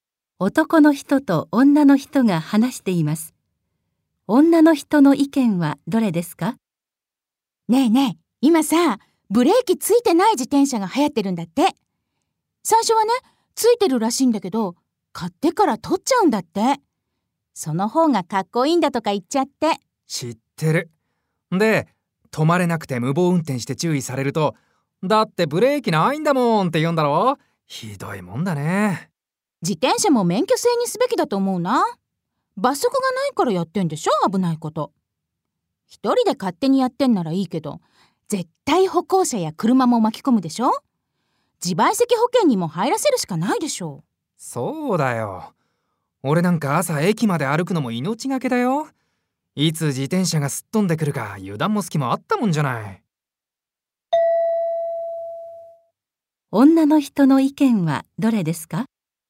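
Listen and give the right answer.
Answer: 自転車も免許制にして罰則を設けるべきだ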